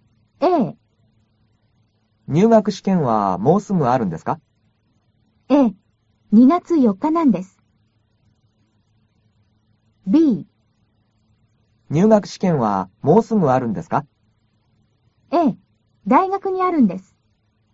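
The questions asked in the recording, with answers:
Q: 入学試験はもうすぐあるんですか?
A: A: ええ、2月4日なんです。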